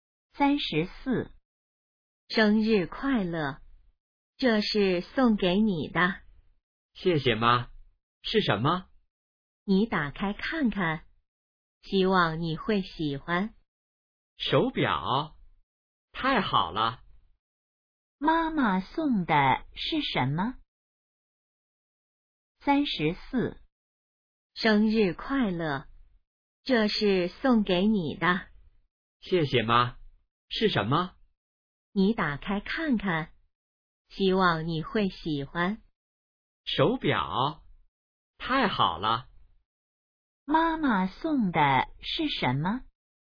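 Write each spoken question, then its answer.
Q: 妈妈送的是什么?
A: 手表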